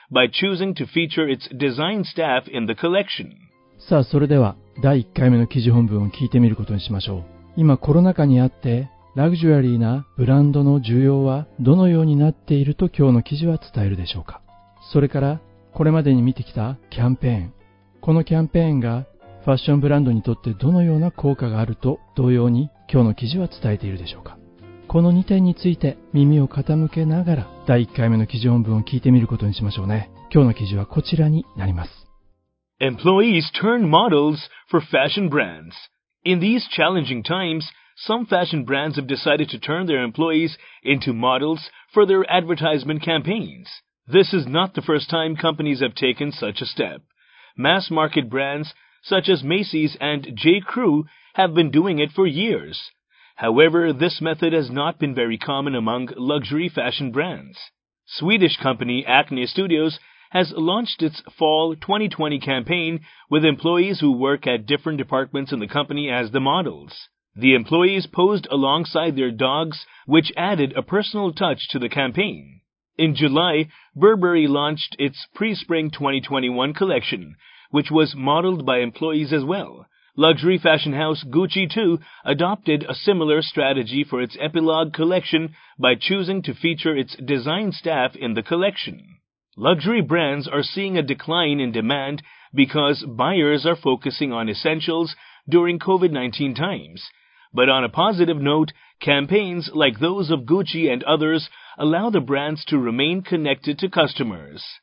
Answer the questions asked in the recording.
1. はい、やはり、ラグジュアリーブランドは are seeing a decline in demand と言っていましたね。
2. 自分たちのブランドを、顧客とのつながりを remain することができる、保つことができているキャンペーンによって。